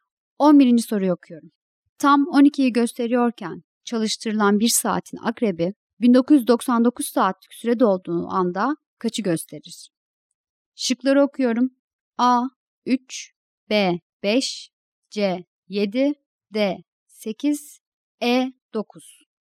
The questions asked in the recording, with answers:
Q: Tam 12'yi gösteriyorken çalıştırılan bir saatin akrebi 1999 saatlik sürede olduğu anda kaçı gösterir?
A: Doğru cevap C.